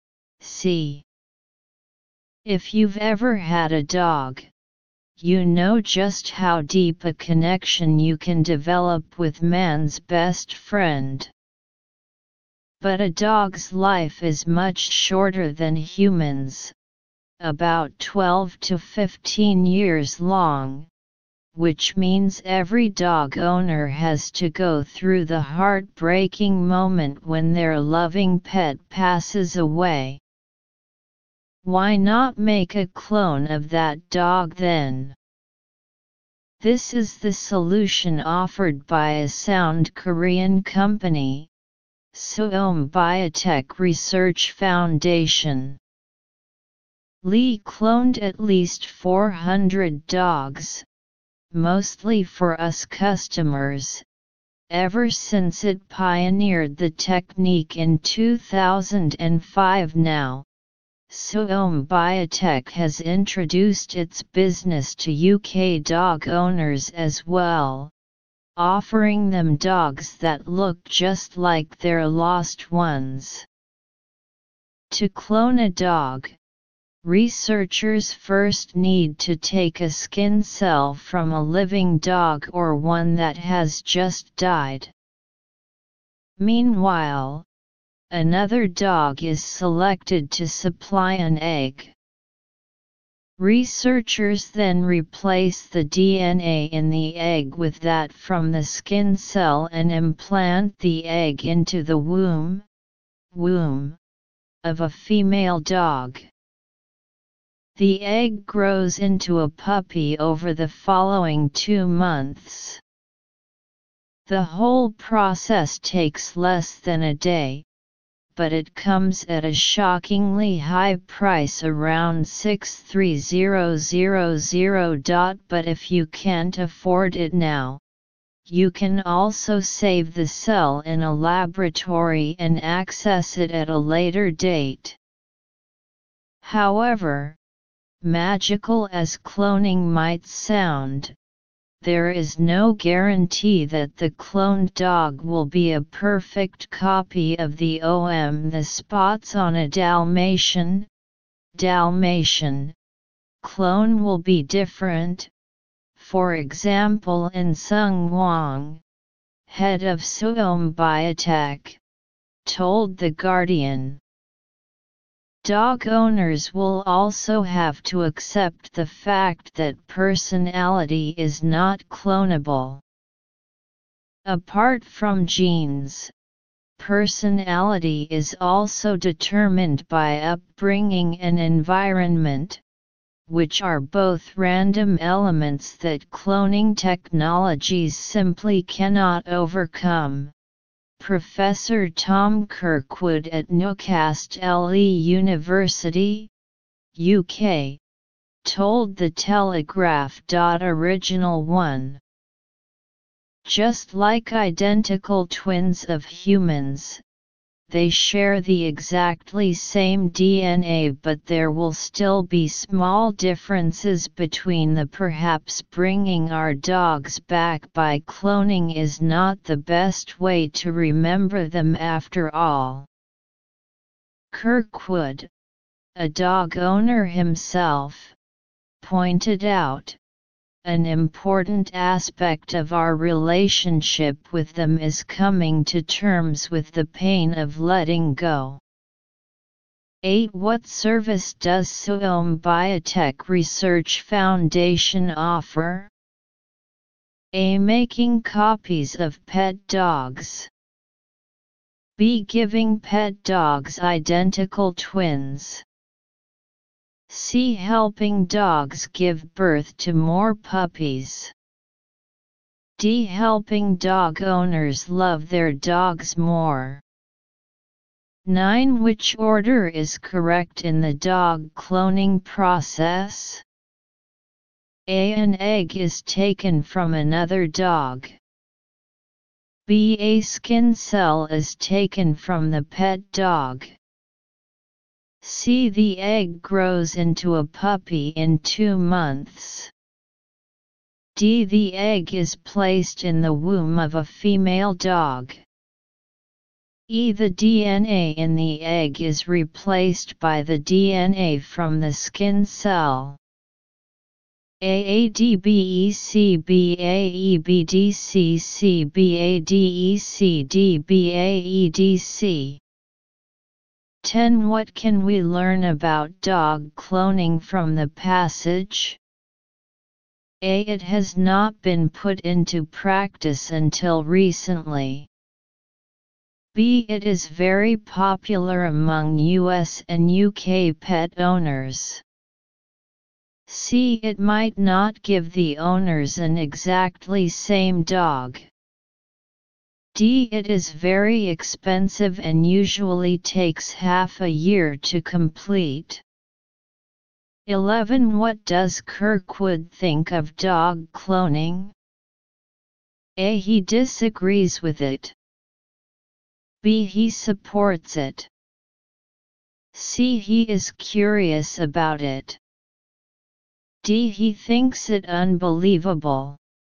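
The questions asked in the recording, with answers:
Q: What service does Seom Biotech Research Foundation offer?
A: A: Making copies of pet dogs.

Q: What can we learn about dog cloning from the passage?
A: C: It might not give the owners an exactly same dog.

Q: What does Kirkwood think of dog cloning?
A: A: He disagrees with it.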